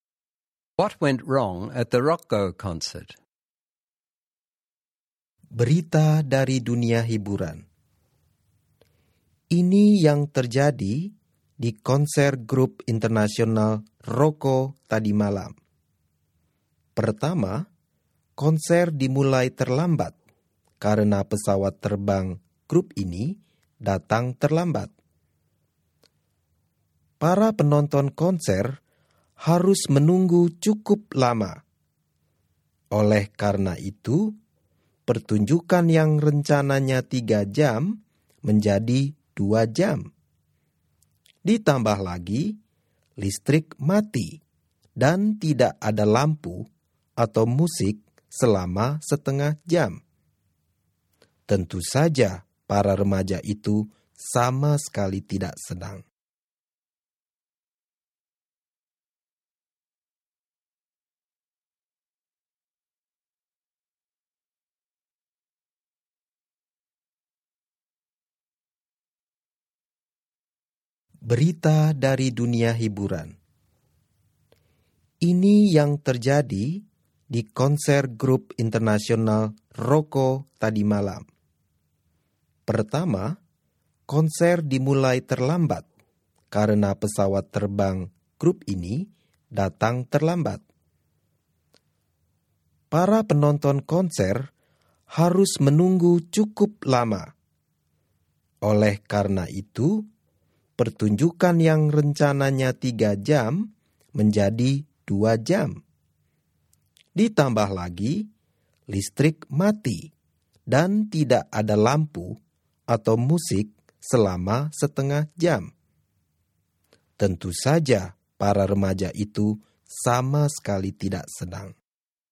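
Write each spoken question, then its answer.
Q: What went wrong at the Rocco concert?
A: It started late because the band's plane was late, it was cut from 3 to 2 hours, and the power failed for half an hour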